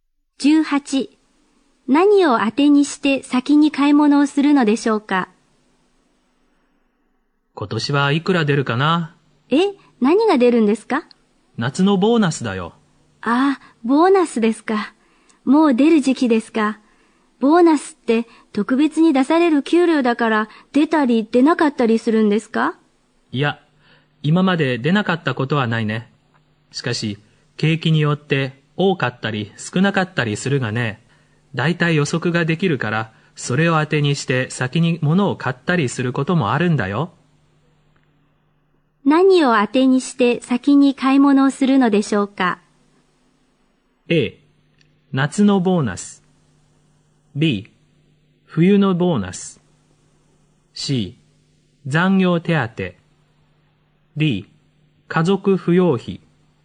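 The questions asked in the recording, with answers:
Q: 何を当てにして先に買い物をするのでしょうか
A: A: 夏のボーナス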